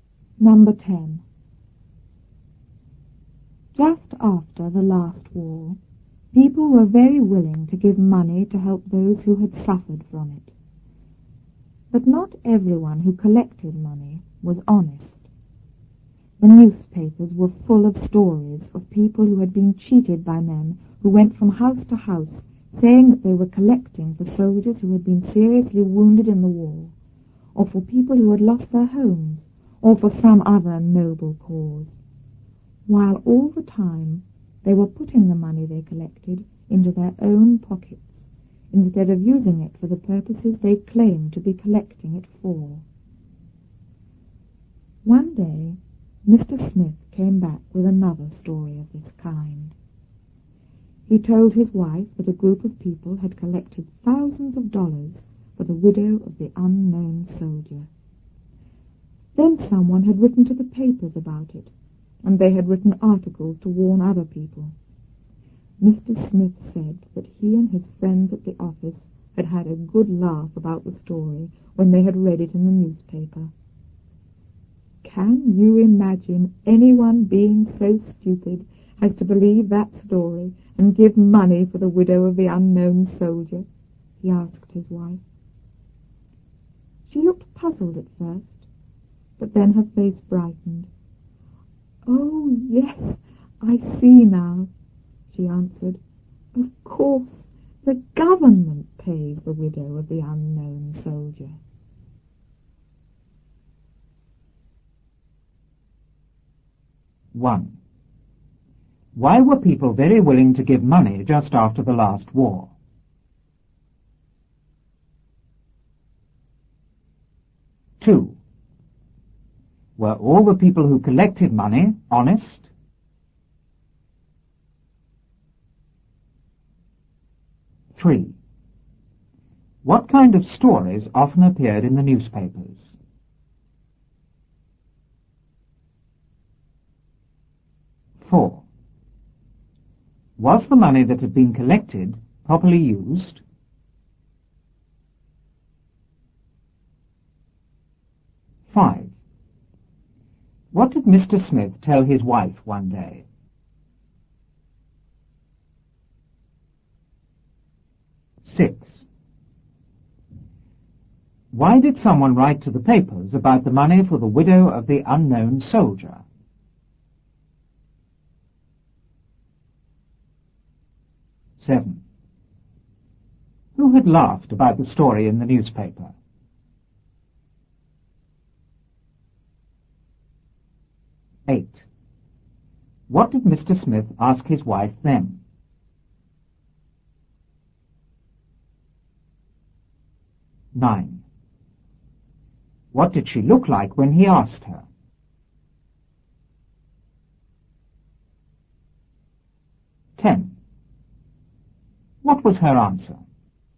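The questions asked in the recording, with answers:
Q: Why were people very willing to give money just after the last war?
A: To help those who had suffered from the war

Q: Were all the people who collected money honest?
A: No, not all of them were honest

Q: What kind of stories often appeared in the newspapers?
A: Stories of people cheated by men collecting money for noble causes who kept it for themselves

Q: Was the money that had been collected properly used?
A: No, the collectors put it into their own pockets

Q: What did Mr. Smith tell his wife one day?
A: That a group had collected thousands of dollars for the widow of the unknown soldier

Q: Why did someone write to the papers about the money for the widow of the unknown soldier?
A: To warn other people

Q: Who had laughed about the story in the newspaper?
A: Mr. Smith and his friends at the office

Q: What did Mr. Smith ask his wife then?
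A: Whether she could imagine anyone so stupid as to give money for the widow of the unknown soldier

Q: What did she look like when he asked her?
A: Puzzled at first, then her face brightened

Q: What was her answer?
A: Of course, the government pays the widow of the unknown soldier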